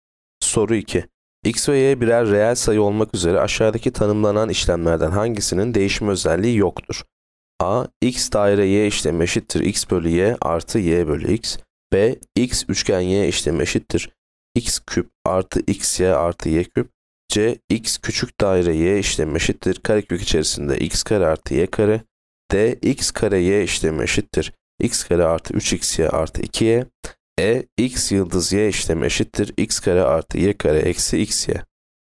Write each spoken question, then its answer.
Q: X ve Y birer reel sayı olmak üzere aşağıdaki tanımlanan işlemlerden hangisinin değişim özelliği yoktur?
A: Yanıt D. X kare Y işlemi eşittir X kare artı 3xy artı 2y.